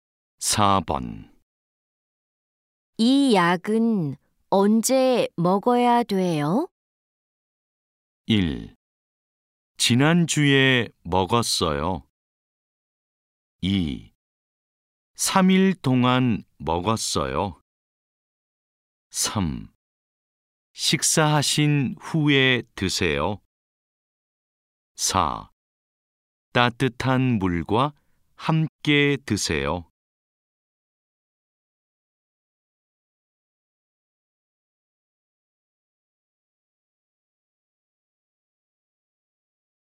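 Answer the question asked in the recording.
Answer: 3: 식사하신 후에 드세요.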